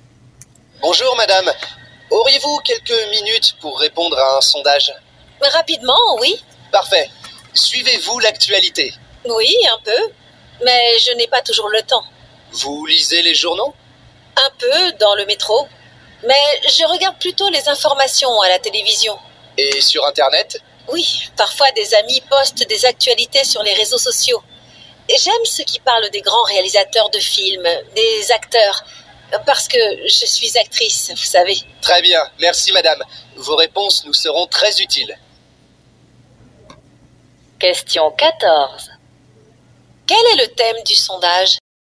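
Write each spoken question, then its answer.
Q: Quel est le thème du sondage ?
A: L'actualité / les médias d'information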